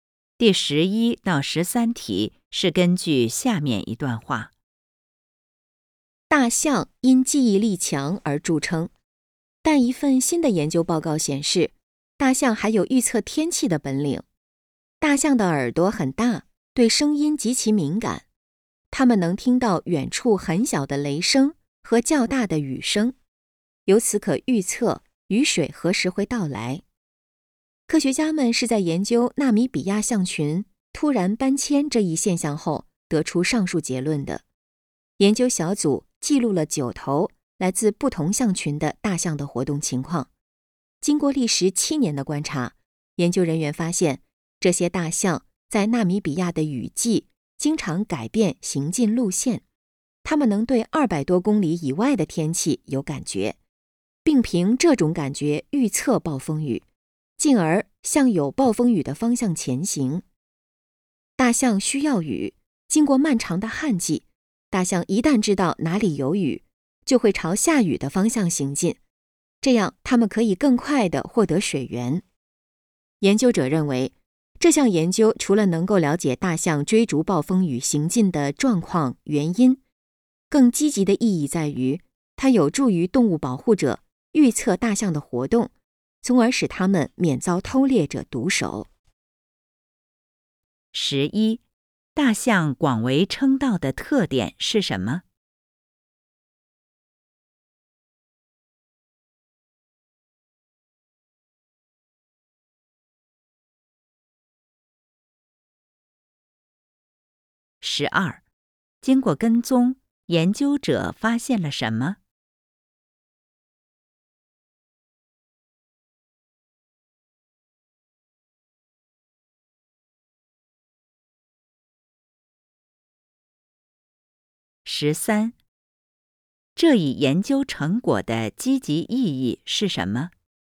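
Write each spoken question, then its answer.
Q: 大象广为称道的特点是什么?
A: 记忆力强

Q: 经过跟踪,研究者发现了什 么?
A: 大象能预测暴风雨,并向有暴风雨的方向前行

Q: 这一研究成果的积极意义是什么?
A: 有助于预测大象的活动,使它们免遭偷猎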